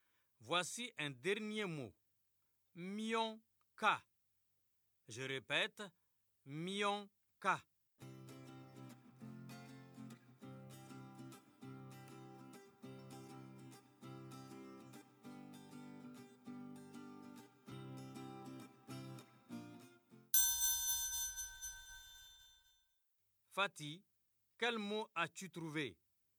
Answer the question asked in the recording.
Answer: Mionka. C'est camion, monsieur.